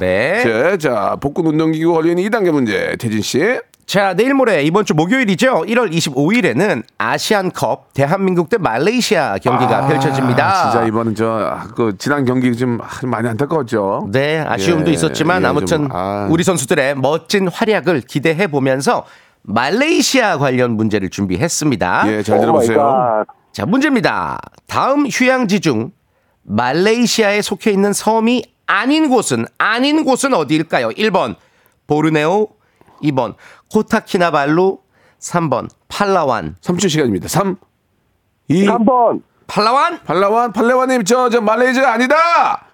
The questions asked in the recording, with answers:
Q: 다음 휴양지 중 말레이시아에 속해 있는 섬이 아닌 곳은 아닌 곳은 어디일까요?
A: 3번 팔라완